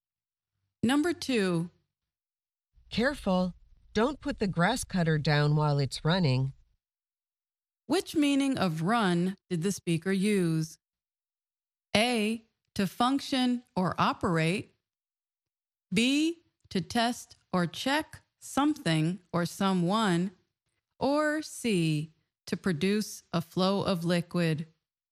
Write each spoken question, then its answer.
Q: Which meaning of run did the speaker use?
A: The answer is A, to function or operate.